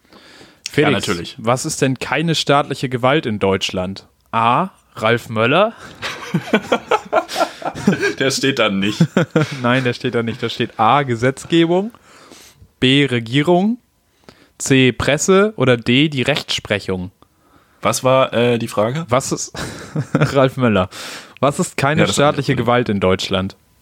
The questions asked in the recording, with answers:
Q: was ist denn keine staatliche Gewalt in Deutschland?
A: Ja, die Presse ist keine staatliche Gewalt.